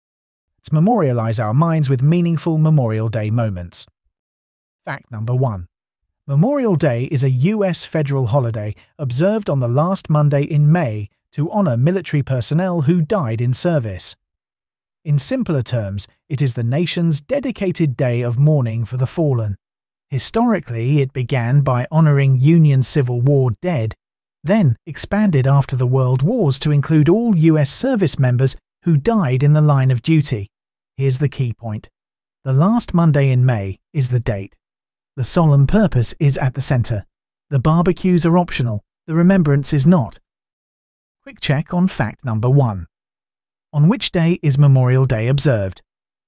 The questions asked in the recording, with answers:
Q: On which day is Memorial Day observed?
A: The last Monday in May.